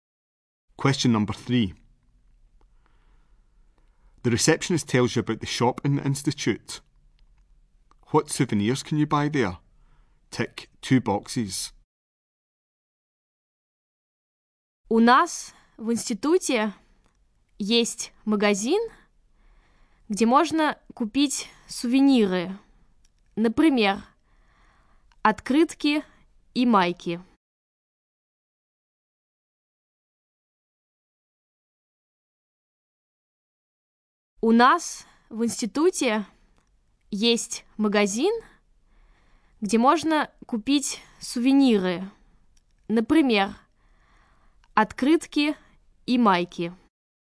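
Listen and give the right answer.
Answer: Postcards and T-shirts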